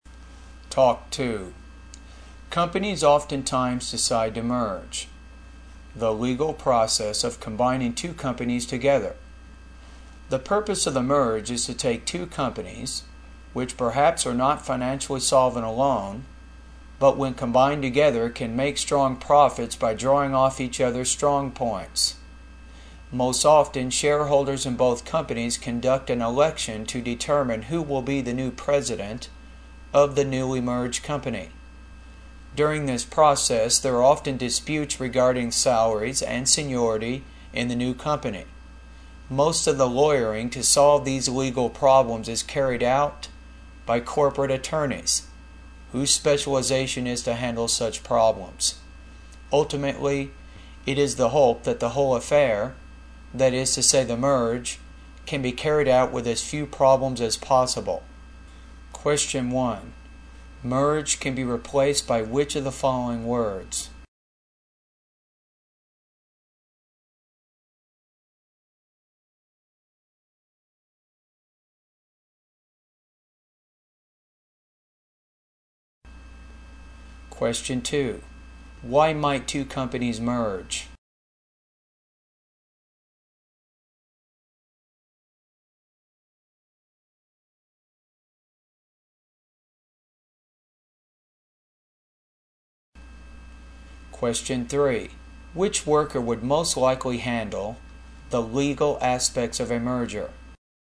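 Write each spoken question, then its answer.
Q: Why might two companies merge?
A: To make strong profits together by drawing on each other's strong points

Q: Which worker would most likely handle the legal aspects of a merger?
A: A corporate attorney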